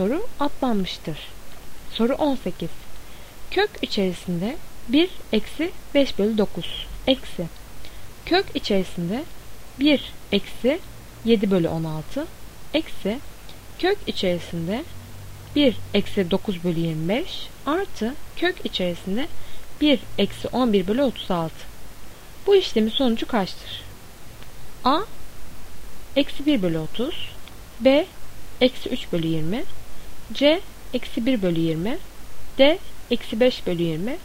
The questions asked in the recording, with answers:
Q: Bu işlemin sonucu kaçtır?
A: Doğru cevap C. Eksi 1 bölü 20.